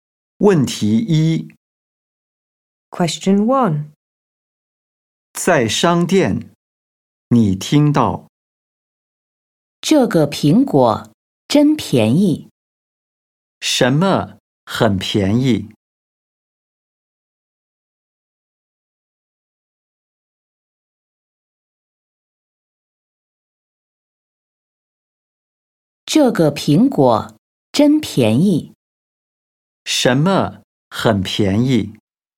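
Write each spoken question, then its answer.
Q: 什么很便宜?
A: 这个苹果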